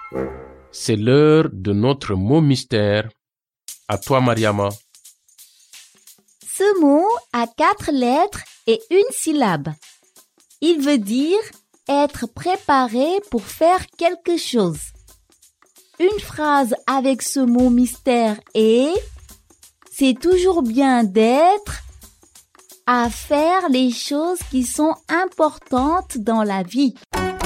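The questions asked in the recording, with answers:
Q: Une phrase avec ce mot mystère est « C'est toujours bien d'être » à faire les choses qui sont importantes dans la vie.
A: prêt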